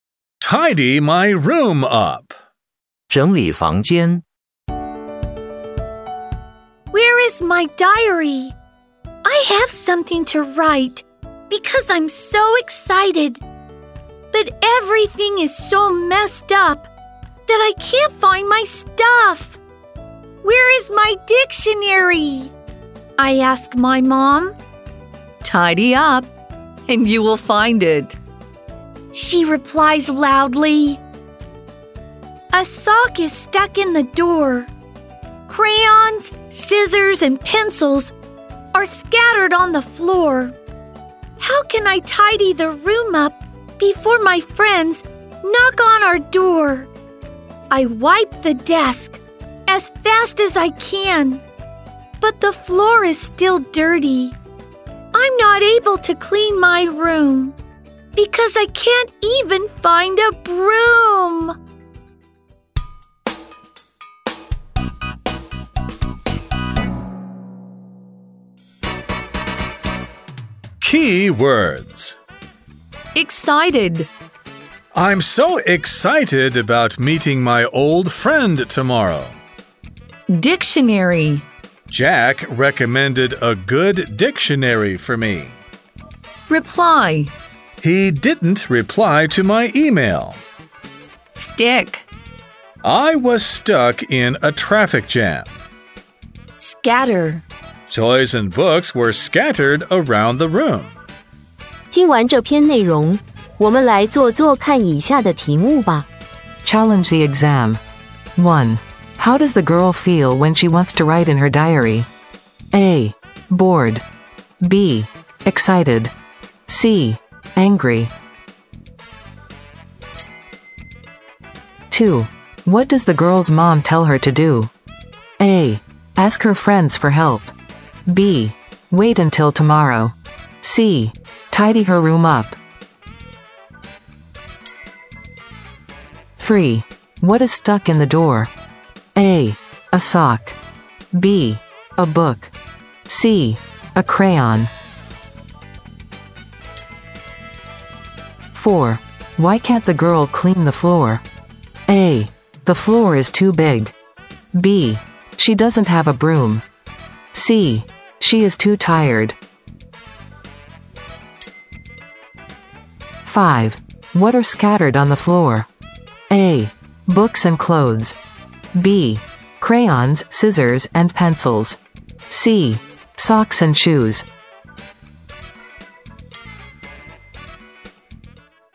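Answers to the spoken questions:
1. B: Excited.
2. C: Tidy her room up.
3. A: A sock.
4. B: She doesn't have a broom.
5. B: Crayons, scissors, and pencils.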